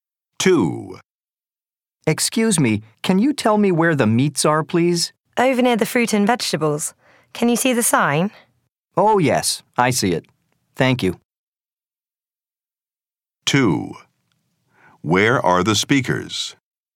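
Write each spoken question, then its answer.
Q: Where are the speakers?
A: In a supermarket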